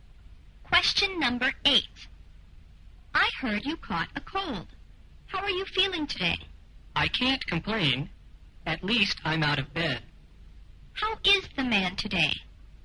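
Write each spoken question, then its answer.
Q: How is the man today?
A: He is getting better; he's out of bed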